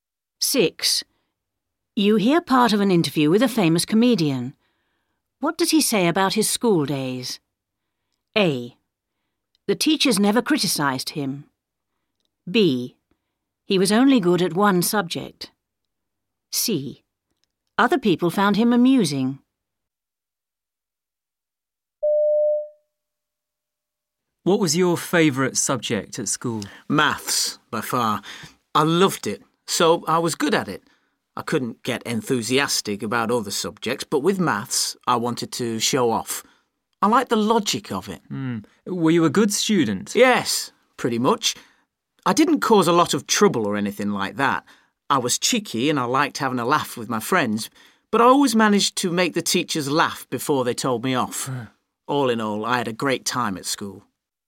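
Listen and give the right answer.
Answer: C: Other people found him amusing.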